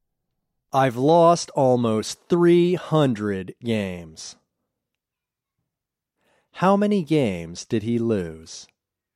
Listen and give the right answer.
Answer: He lost almost 300 games.